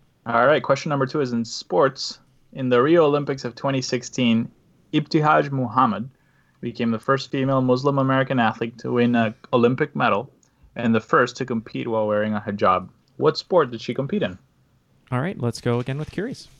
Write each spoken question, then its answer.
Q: What sport did she compete in?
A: Fencing is correct.